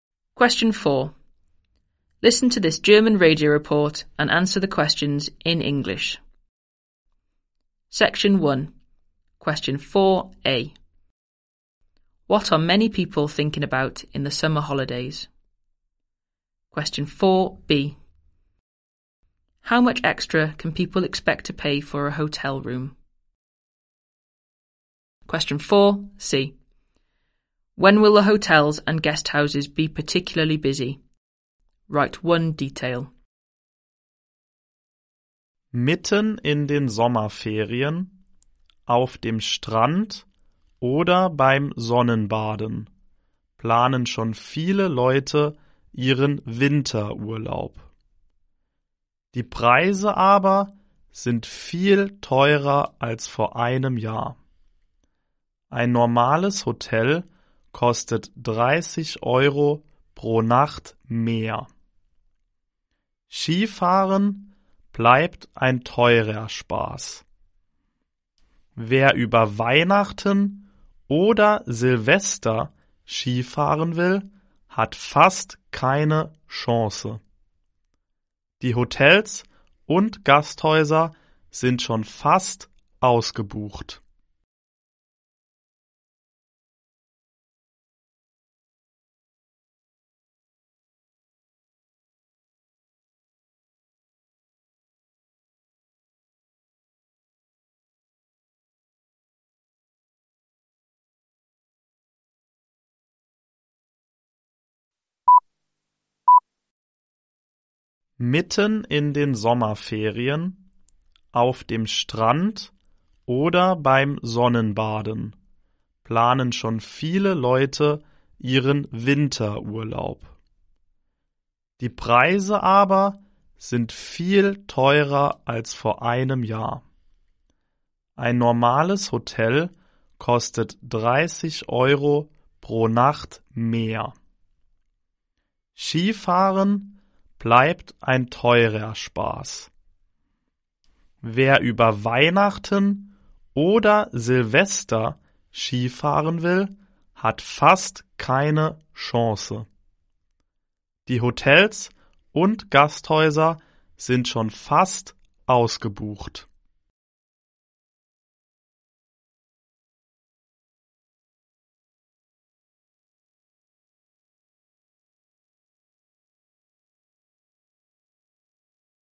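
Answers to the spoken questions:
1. Their winter holiday
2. 30 euros per night
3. Over Christmas or New Year's Eve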